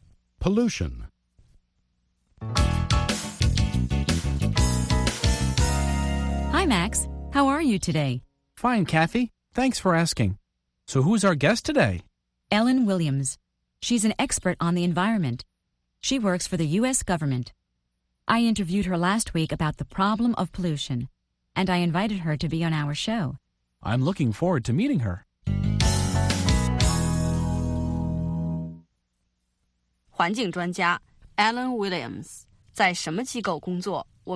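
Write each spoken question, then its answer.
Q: 环境专家 Alan Williams 在什么机构工作?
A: 美国政府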